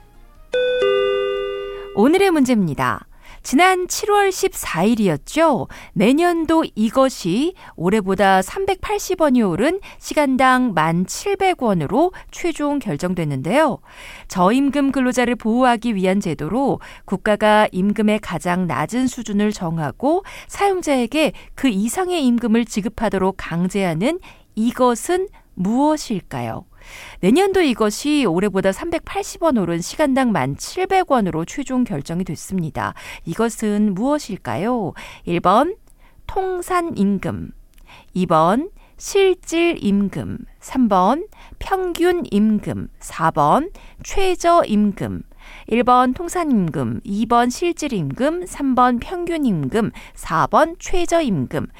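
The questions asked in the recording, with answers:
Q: 이것은 무엇일까요? 1번 통산임금, 2번 실질임금, 3번 평균임금, 4번 최저임금.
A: 4: 최저임금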